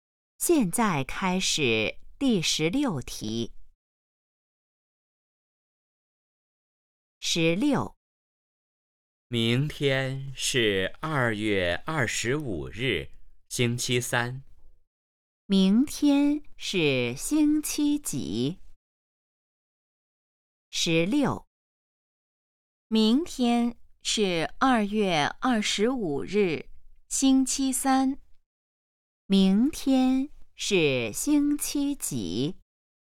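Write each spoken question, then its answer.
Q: 明天是星期几?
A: 星期三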